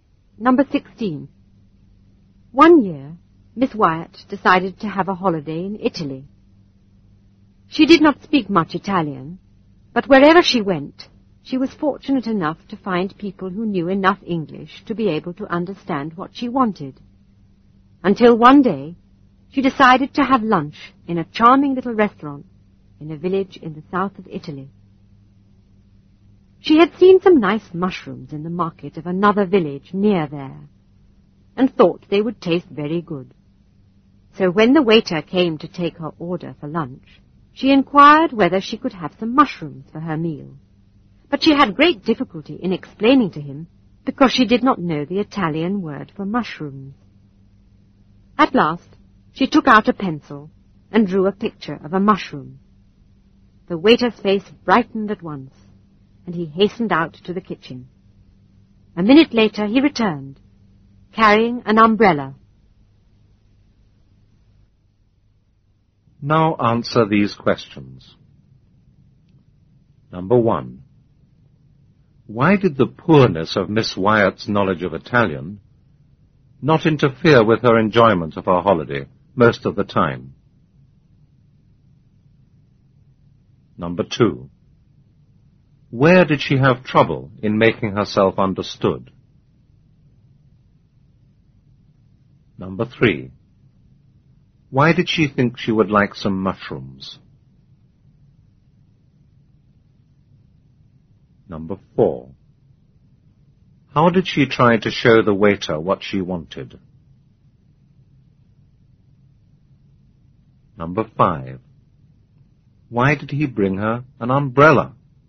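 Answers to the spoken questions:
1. Wherever she went, she found people who knew enough English to understand what she wanted.
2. In a little restaurant in a village in the south of Italy.
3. She had seen some nice mushrooms in the market of a nearby village.
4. She drew a picture of a mushroom.
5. He thought her drawing of a mushroom was a picture of an umbrella.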